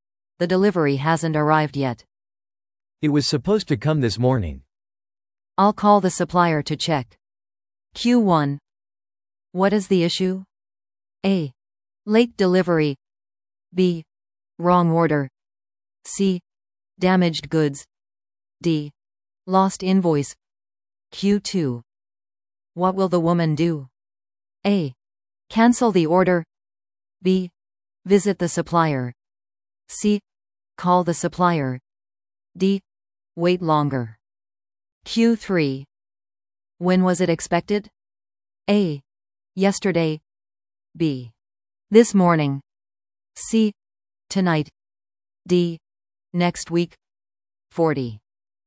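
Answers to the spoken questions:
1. A: Late delivery.
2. C: Call the supplier.
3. B: This morning.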